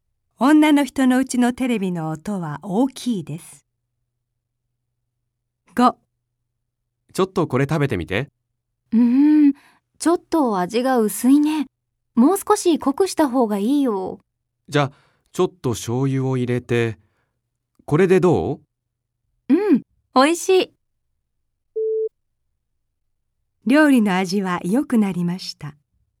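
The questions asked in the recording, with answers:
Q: 料理の味は良くなりました。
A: ○(正しい)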